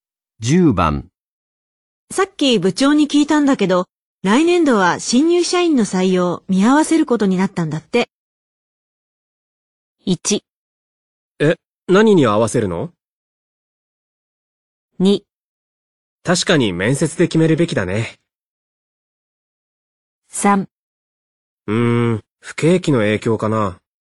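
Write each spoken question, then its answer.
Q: さっき部長に聞いたんだけど、来年度は新入社員の採用見合わせることになったんだって。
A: 3: うーん、不景気の影響かな。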